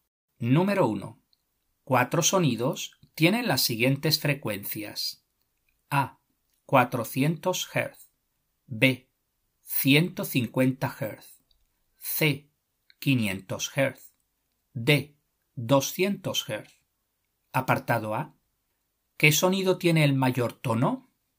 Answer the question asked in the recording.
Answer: Luego la respuesta es la C, 500 Hz.